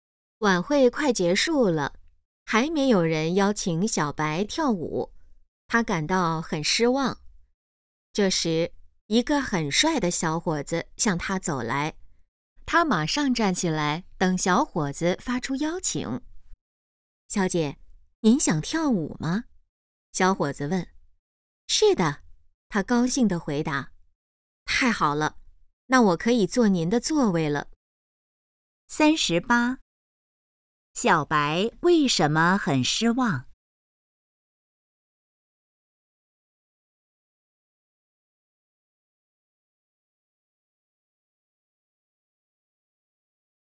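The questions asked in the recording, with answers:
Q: 小白为什么很失望?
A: 没有人邀请她跳舞

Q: 小伙子想要做什么?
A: 坐她的座位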